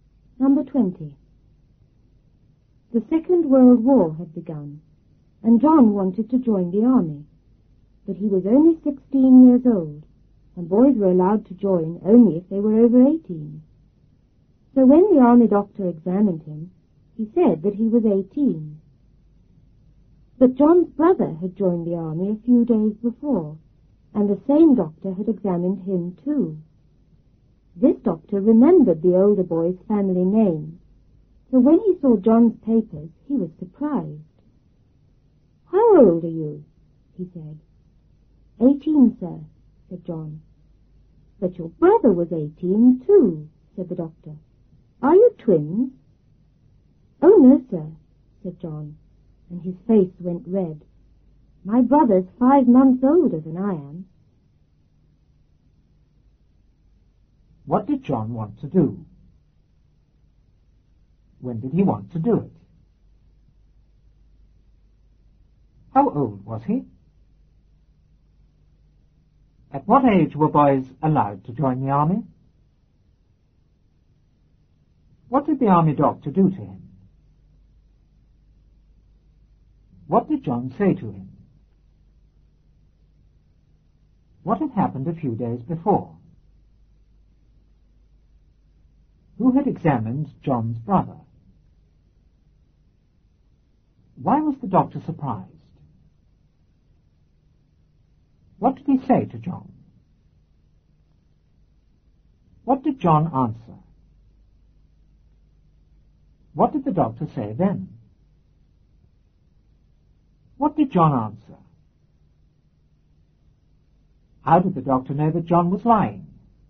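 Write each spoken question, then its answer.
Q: What did John want to do?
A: Join the army

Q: When did he want to do it?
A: When the Second World War had begun

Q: How old was he?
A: 16

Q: At what age were boys allowed to join the army?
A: Over 18

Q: What did the army doctor do to him?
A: He examined him

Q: What did John say to him?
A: That he was 18

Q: What had happened a few days before?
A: John's brother had joined the army

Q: Who had examined John's brother?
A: The same doctor

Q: Why was the doctor surprised?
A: He remembered the family name from John's brother

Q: What did he say to John?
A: How old are you?

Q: What did John answer?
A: 18, sir

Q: What did the doctor say then?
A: But your brother was 18 too. Are you twins?

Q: What did John answer?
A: No, my brother's 5 months older than I am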